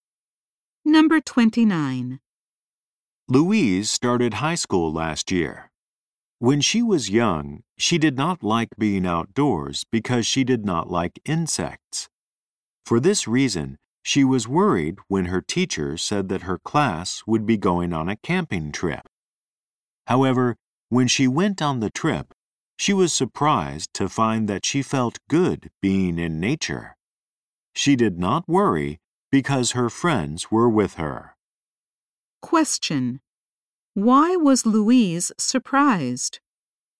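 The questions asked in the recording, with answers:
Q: Why was Louise surprised?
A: She felt good being in nature.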